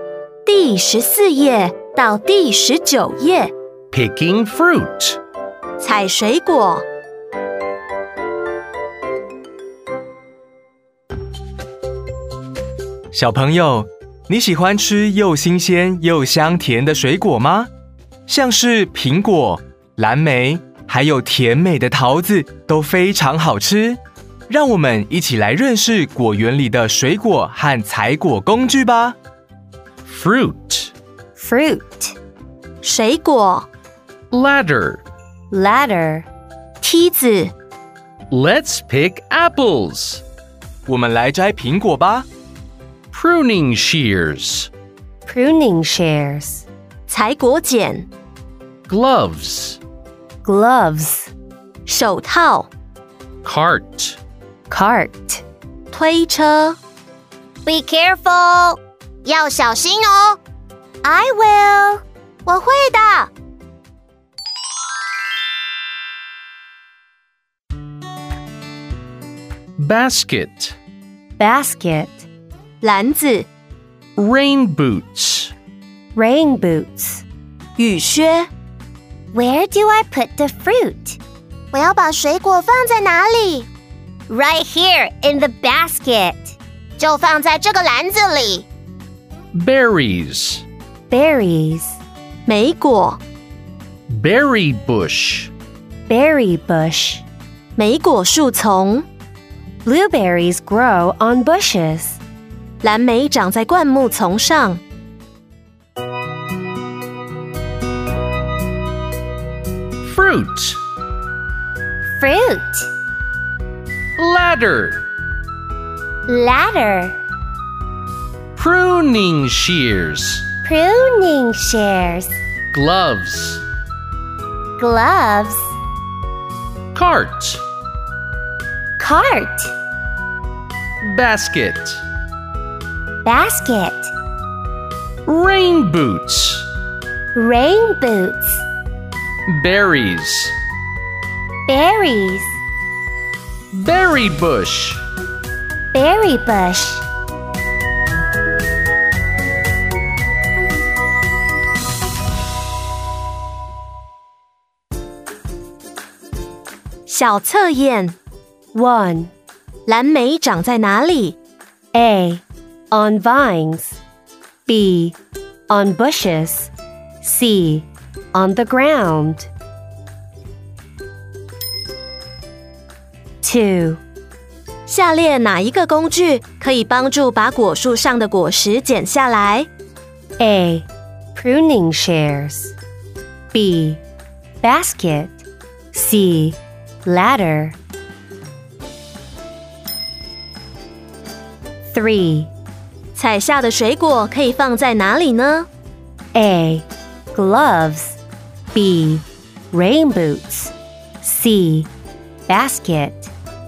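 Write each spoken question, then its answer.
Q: 蓝莓长在哪里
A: B: On bushes.

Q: 下列哪一个工具可以帮助把果树上的果实剪下来?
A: A: Pruning shears.

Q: 采下的水果可以放在哪里呢?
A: C: Basket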